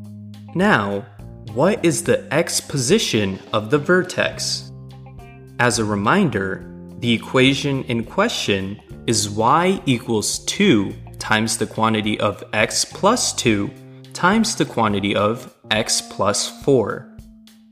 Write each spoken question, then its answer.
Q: Now, what is the x position of the vertex?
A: The x position of the vertex is at negative 3